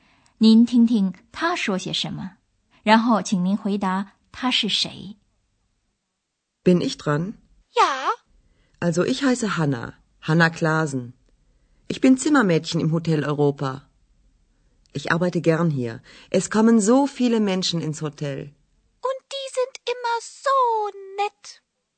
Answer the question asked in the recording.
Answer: 这是 Hannah Klaasen, 她是欧洲饭店里打扫房间的清洁女工。